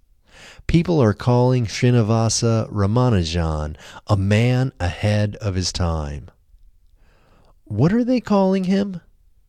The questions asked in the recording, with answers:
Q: What are they calling him?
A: They are calling him a man ahead of his time.